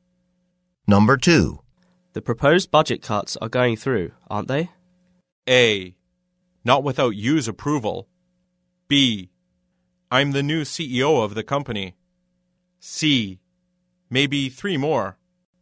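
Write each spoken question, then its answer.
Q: The proposed budget cuts are going through, aren't they?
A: A: Not without you's approval.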